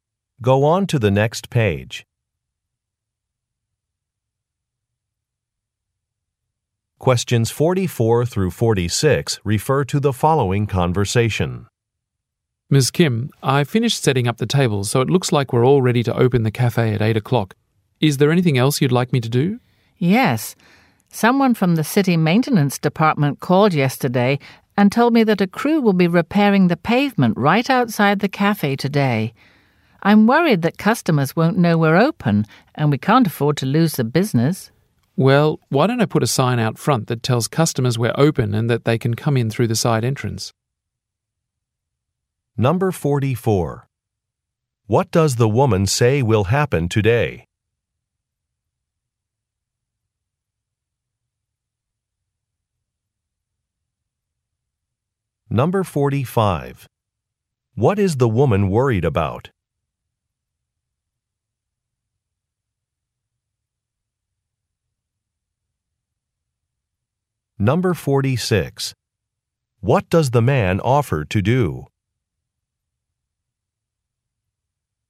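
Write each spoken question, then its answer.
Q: What does the woman say will happen today?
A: A crew will repair the pavement outside the cafe

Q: What is the woman worried about?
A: Losing business because customers won't know they're open

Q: What does the man offer to do?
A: Put a sign out front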